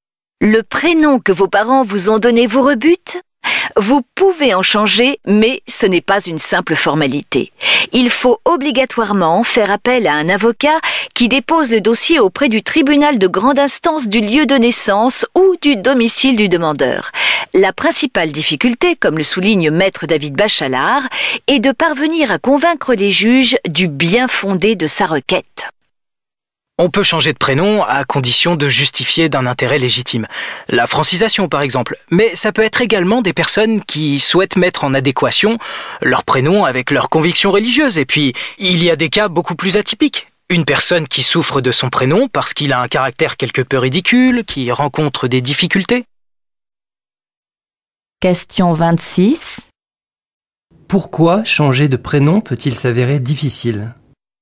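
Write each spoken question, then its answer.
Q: Pourquoi changer de prénom peut-il s'avérer difficile ?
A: Il faut convaincre les juges d'un intérêt légitime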